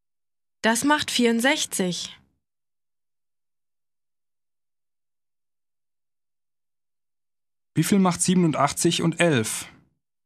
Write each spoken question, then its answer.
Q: Wie Wie viel macht 87 und 11?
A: Das macht 98.